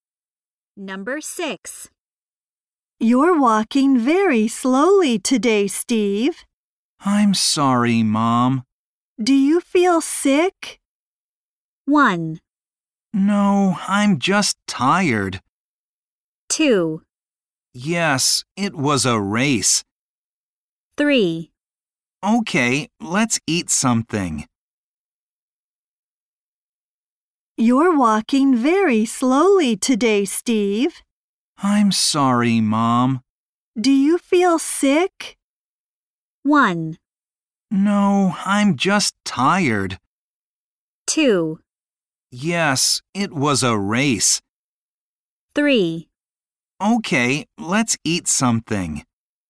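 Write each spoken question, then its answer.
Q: Do you feel sick?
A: 1: No, I'm just tired.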